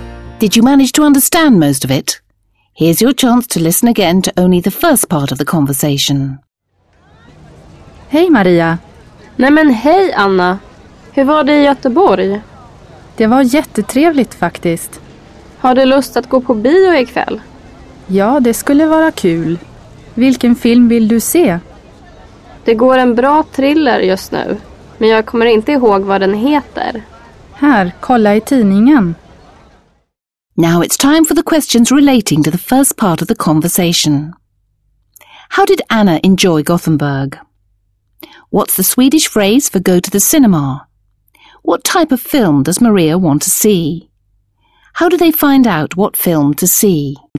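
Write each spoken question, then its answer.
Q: How did Anna enjoy Gothenburg?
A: It was really nice (jättetrevligt)

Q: What's the Swedish phrase for go to the cinema?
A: gå på bio

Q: How do they find out what film to see?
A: They look in the newspaper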